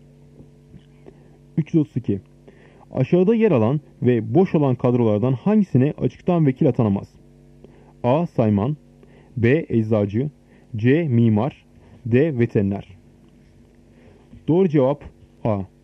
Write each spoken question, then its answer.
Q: Aşağıda yer alan ve boş olan kadrolardan hangisine açıktan vekil atanamaz?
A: Doğru cevap A. Sayman.